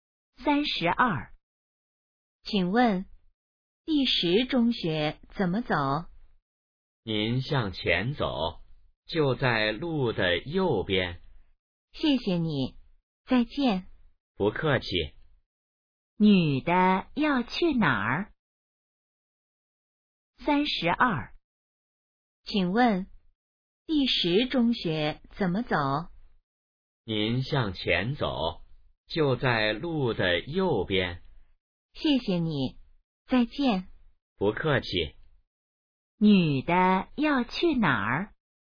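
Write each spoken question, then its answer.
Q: 女的要去哪儿?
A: 第十中学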